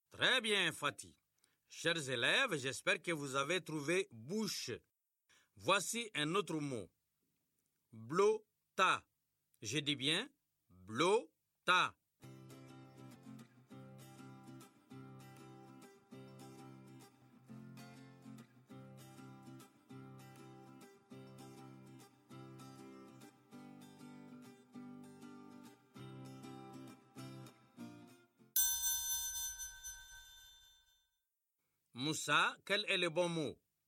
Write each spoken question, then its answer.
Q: Moussa, quel est le bon mot?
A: Tableau, monsieur.